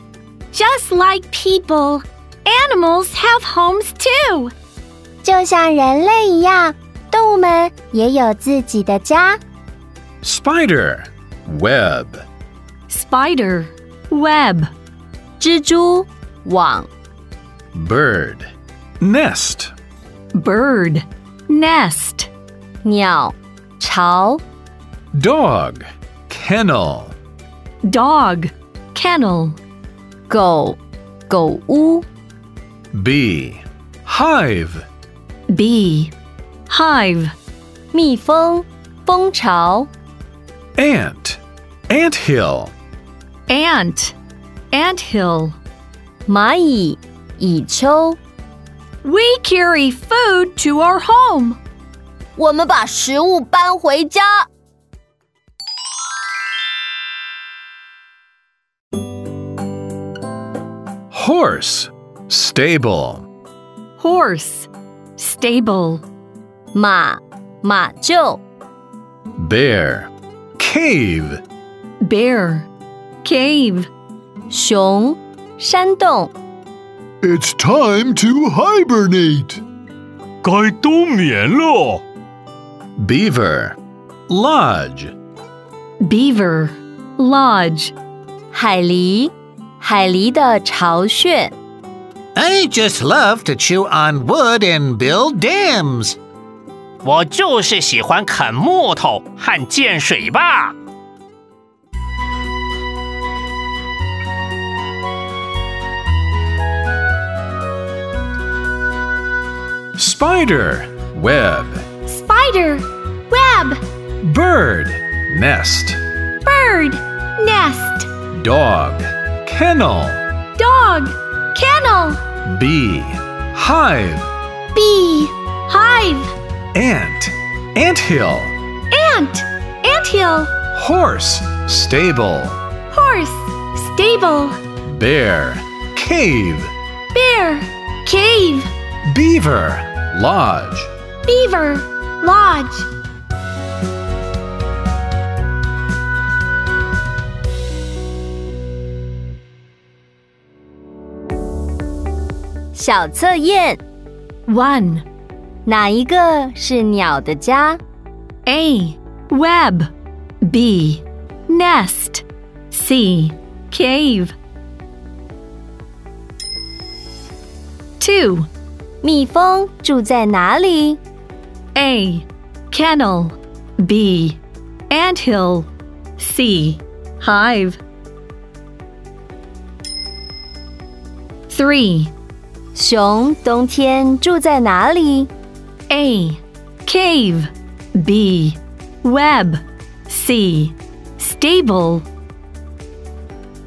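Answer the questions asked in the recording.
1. B: Nest
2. C: Hive
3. A: Cave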